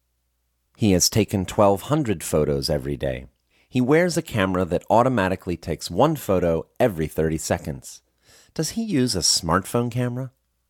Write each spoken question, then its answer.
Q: Does he use a smartphone camera?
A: No, he doesn't use a smartphone camera.